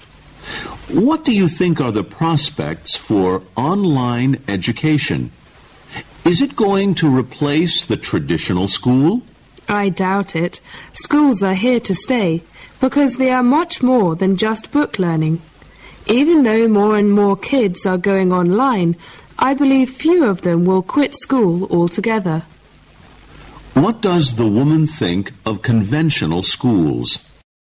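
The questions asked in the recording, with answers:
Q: What does the woman think of conventional schools?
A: They are here to stay because they offer much more than book learning.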